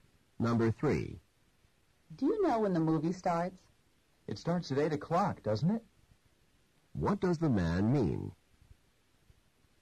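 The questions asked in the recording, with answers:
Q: What does the man mean?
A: He thinks it starts at 8 but isn't sure.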